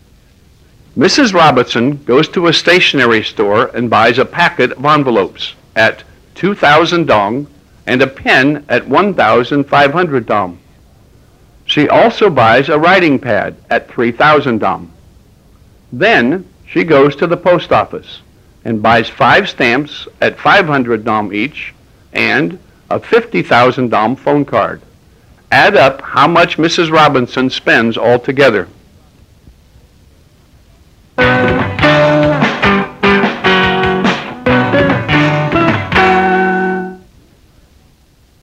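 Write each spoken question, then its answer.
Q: Add up how much Mrs. Robinson spends altogether.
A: 59,000 dong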